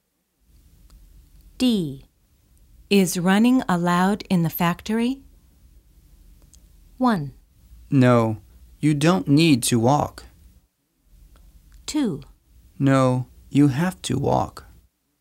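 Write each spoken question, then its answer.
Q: Is running allowed in the factory?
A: 2: No, you have to walk.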